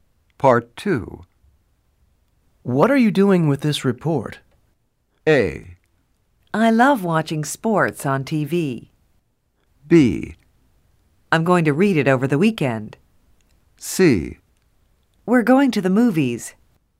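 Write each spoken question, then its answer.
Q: What are you doing with this report?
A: B: I'm going to read it over the weekend.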